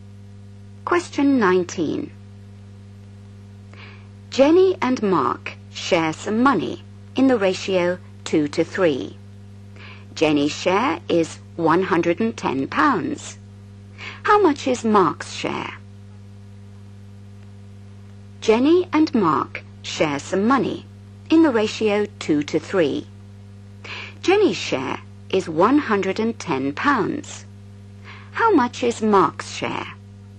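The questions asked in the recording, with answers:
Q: Jenny's share is £110. How much is Mark's share?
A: £165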